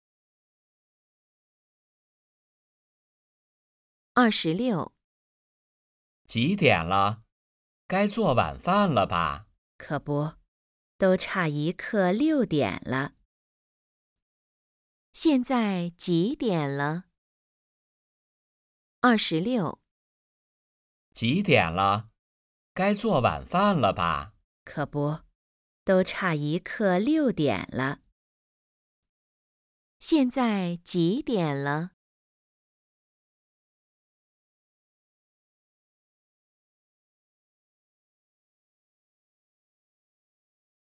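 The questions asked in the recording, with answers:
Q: 现在几点了?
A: 五点四十五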